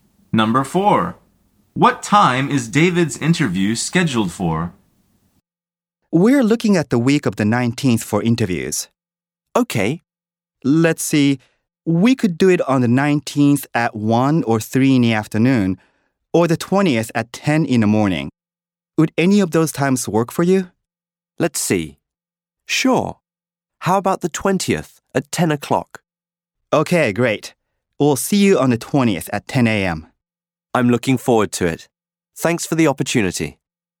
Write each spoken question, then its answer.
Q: What time is David's interview scheduled for?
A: The answer is 10 a.m.